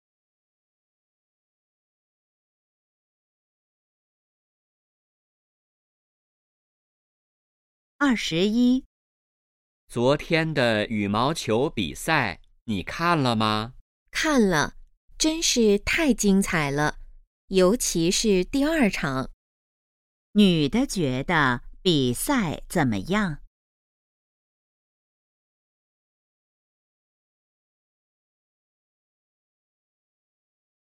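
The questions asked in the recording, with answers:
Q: 女的觉得比赛怎么样?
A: 非常精彩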